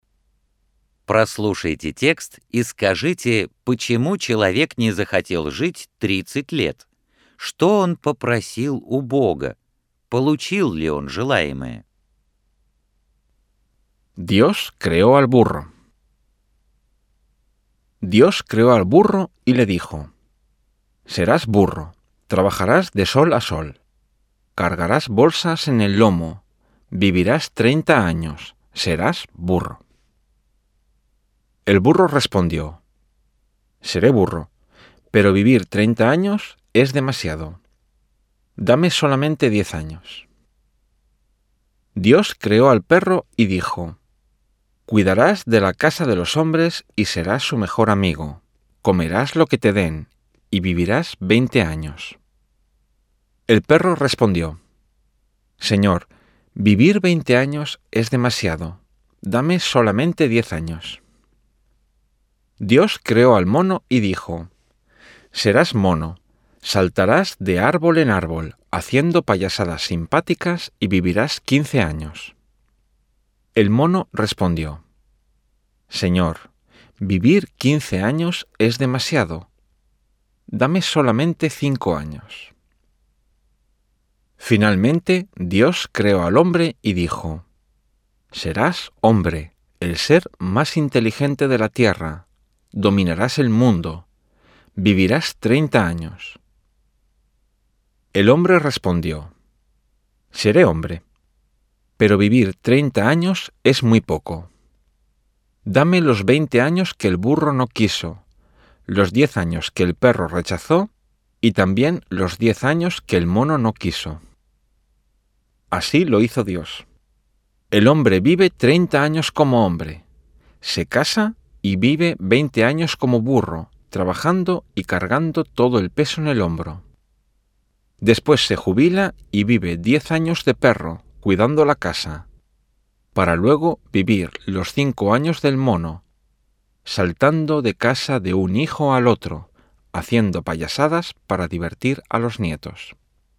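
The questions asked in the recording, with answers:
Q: почему человек не захотел жить 30 лет.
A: 30 лет — это слишком мало

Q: Что он попросил у Бога?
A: Годы, от которых отказались осёл, собака и обезьяна

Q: Получил ли он желаемое?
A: Да, Бог так и сделал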